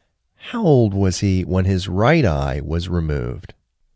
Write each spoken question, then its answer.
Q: How old was he when his right eye was removed?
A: He was just 13 months old when his right eye was removed.